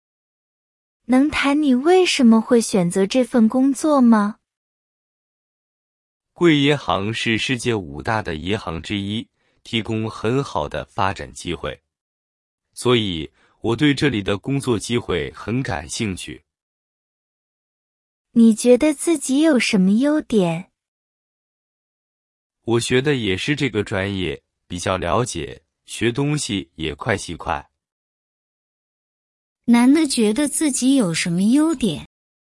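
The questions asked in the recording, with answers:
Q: 男的觉得自己有什么优点?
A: 学的是这个专业,比较了解,学东西也快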